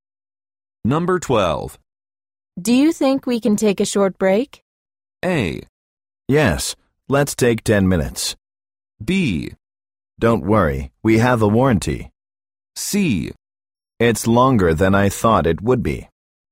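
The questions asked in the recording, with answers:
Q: Do you think we can take a short break?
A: A: Yes, let's take 10 minutes.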